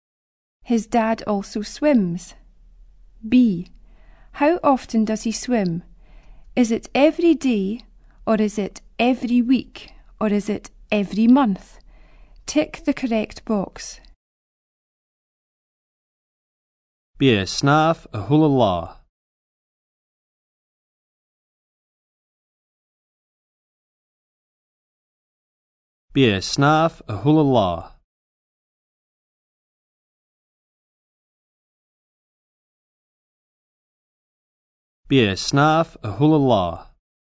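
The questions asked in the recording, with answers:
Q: How often does he swim? Is it every day or is it every week, or is it every month?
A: Every day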